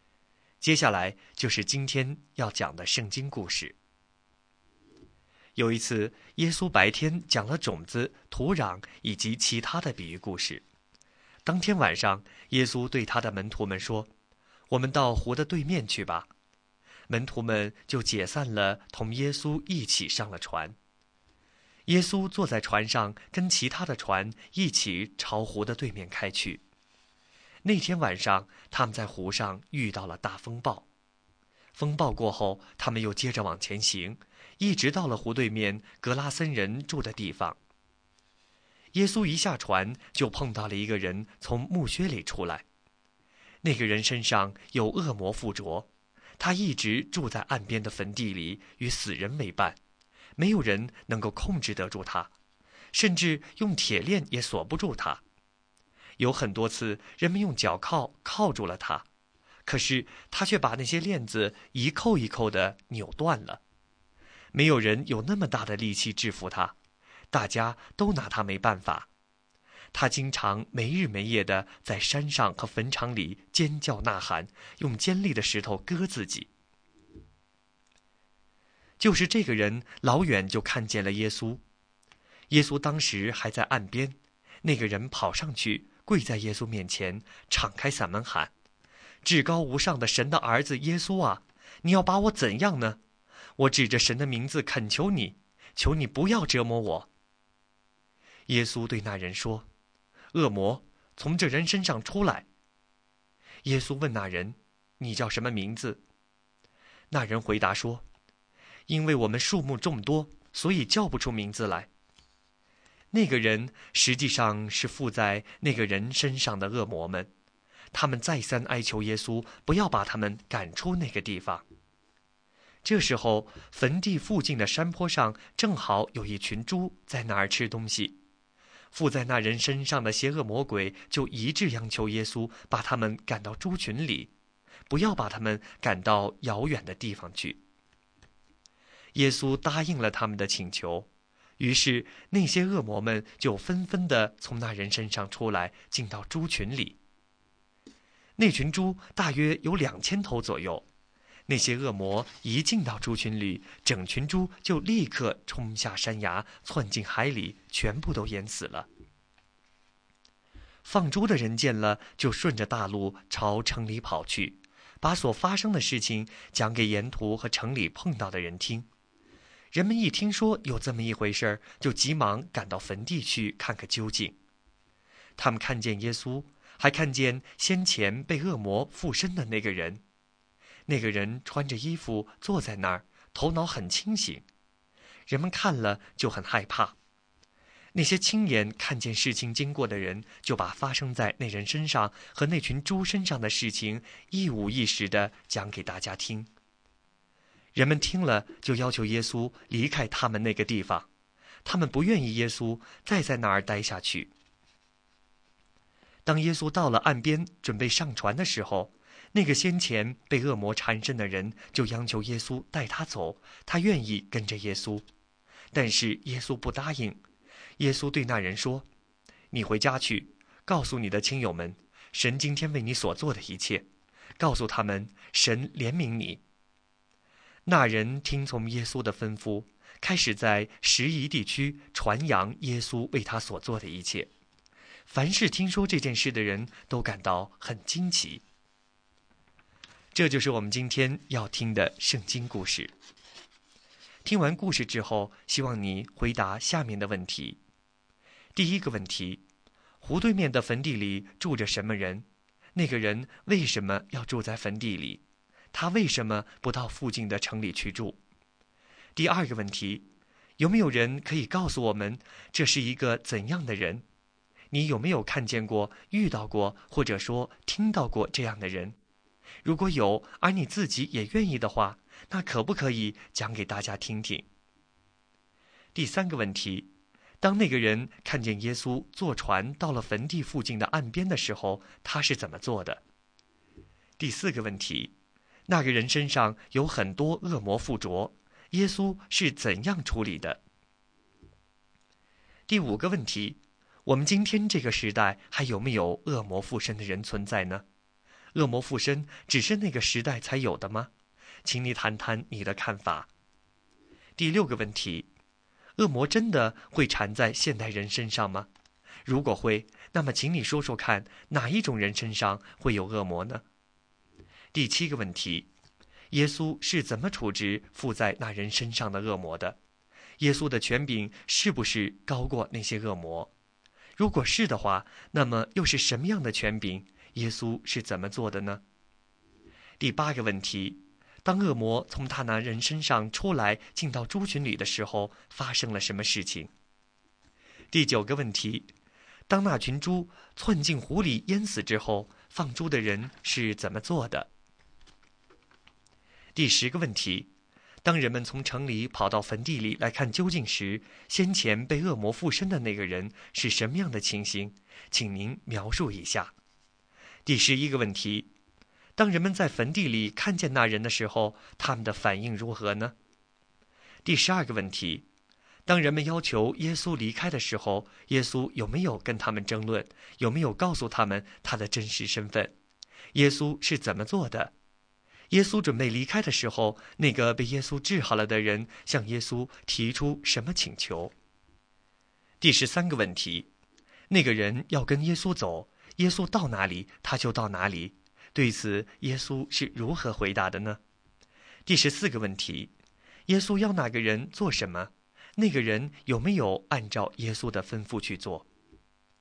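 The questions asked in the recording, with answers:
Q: 湖对面的坟地里住着什么人?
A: 一个被恶魔附身的人

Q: 当那个人看见耶稣坐船到了坟地附近的岸边的时候,他是怎么做的?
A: 他跑上去跪在耶稣面前,大声喊叫,求耶稣不要折磨他

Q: 那个人身上有很多恶魔附着,耶稣是怎样处理的?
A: 命令恶魔从那人身上出来,并准许它们进到猪群里

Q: 当恶魔从他那人身上出来进到猪群里的时候,发生了什么事情?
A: 大约两千头猪冲下山崖,窜进海里全部淹死了

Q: 当那群猪窜进湖里淹死之后,放猪的人是怎么做的?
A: 跑到城里,把发生的事情告诉沿途和城里的人

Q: 当人们从城里跑到坟地里来看究竟时,先前被恶魔附身的那个人是什么样的情形?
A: 他穿着衣服坐在那里,头脑很清醒

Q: 当人们在坟地里看见那人的时候,他们的反应如何呢?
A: 他们很害怕,并要求耶稣离开

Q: 那个人要跟耶稣走,耶稣到哪里他就到哪里,对此耶稣是如何回答的呢?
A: 耶稣不答应,叫他回家告诉亲友神为他所做的一切

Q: 耶稣要那个人做什么?那个人有没有按照耶稣的吩咐去做?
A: 回家告诉亲友神为他所做的事;有,他在低加坡里(拾遗)地区传扬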